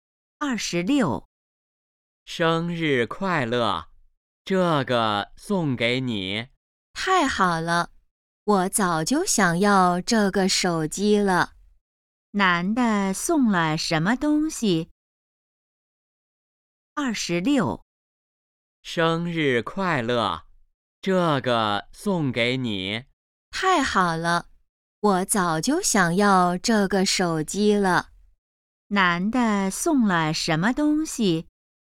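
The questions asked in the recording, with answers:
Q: 男的送了什么东西?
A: 手机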